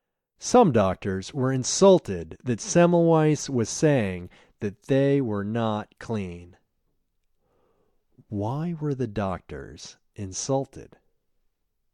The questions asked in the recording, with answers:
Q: Why were the doctors insulted?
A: The doctors were insulted that Semmelweis was saying that they were not clean.